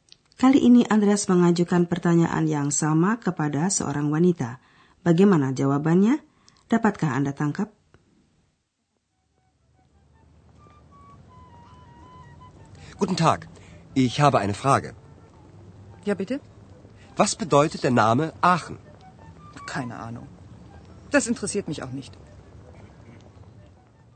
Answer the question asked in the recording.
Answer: Wanita itu mengatakan ia ya, sama sekali tidak tahu.